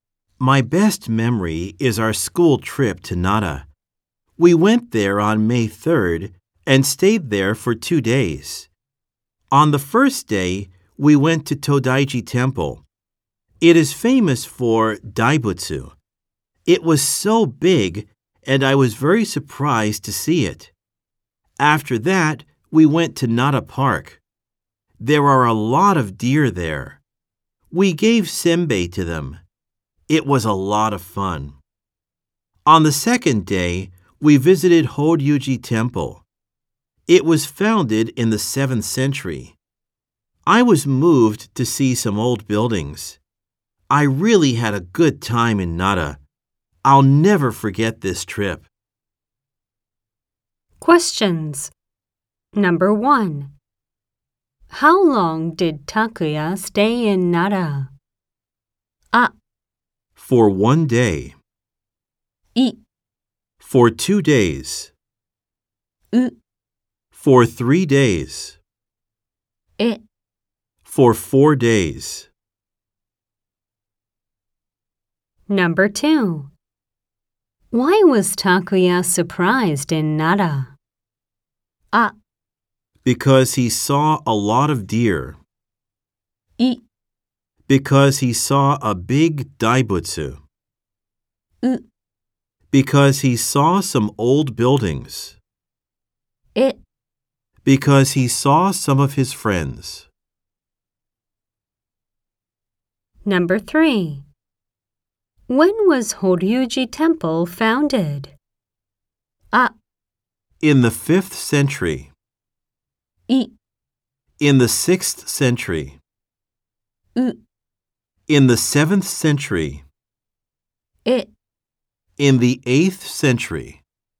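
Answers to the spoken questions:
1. い: For 2 days.
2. い: Because he saw a big daibutsu.
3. う: In the 7th century.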